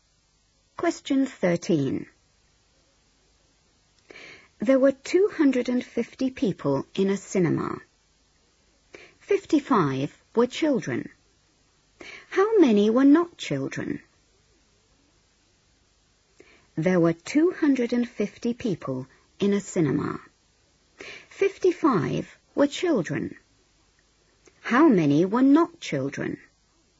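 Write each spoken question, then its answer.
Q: 55 were children. How many were not children?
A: 195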